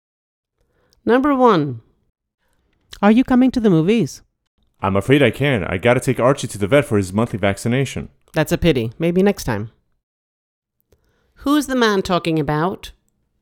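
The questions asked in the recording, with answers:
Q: Who's the man talking about?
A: His pet, Archie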